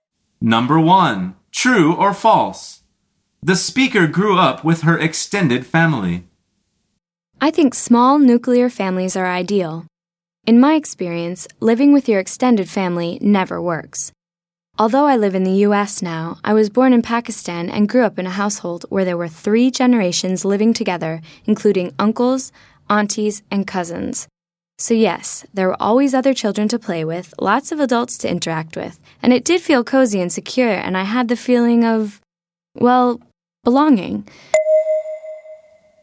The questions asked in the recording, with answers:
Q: True or false? The speaker grew up with her extended family.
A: The answer is true.